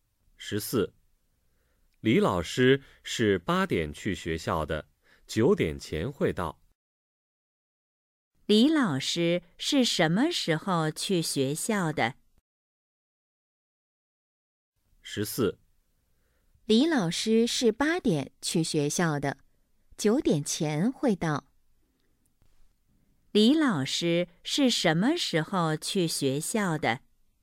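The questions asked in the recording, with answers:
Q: 李老师是什么时候去学校的?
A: 8点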